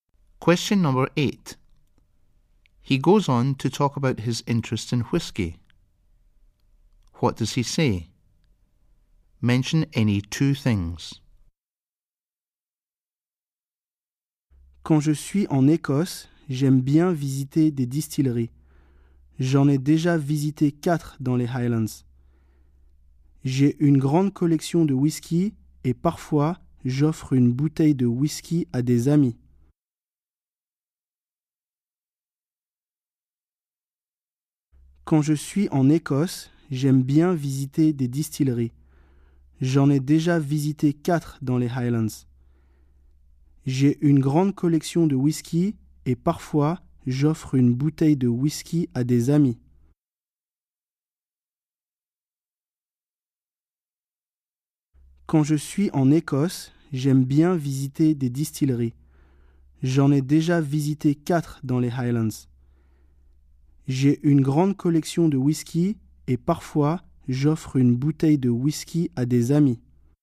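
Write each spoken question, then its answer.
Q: What does he say? Mention any 2 things.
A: He likes visiting distilleries; he has visited 4 in the Highlands; he has a big whisky collection; he sometimes gives bottles of whisky to friends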